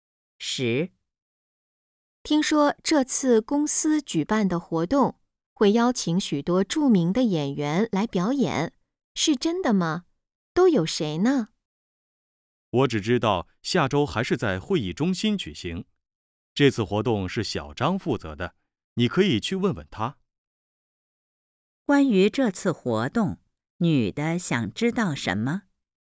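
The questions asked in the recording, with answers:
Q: 关于这次活动,女的想知道什么?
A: 有哪些著名演员来表演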